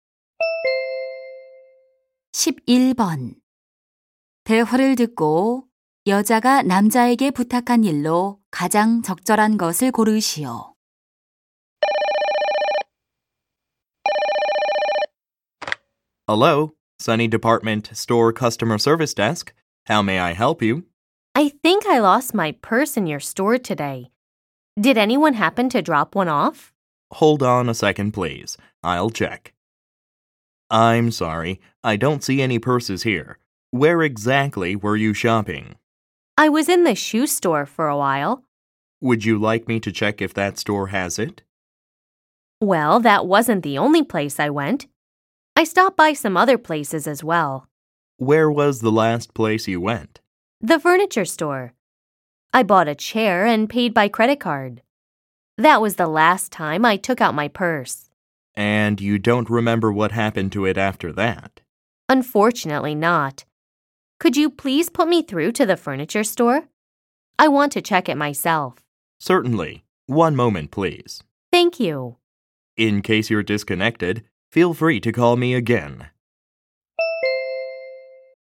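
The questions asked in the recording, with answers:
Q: 대화를 듣고 여자가 남자에게 부탁한 일로 가장 적절한 것을 고르시오.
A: 가구점으로 전화 연결하기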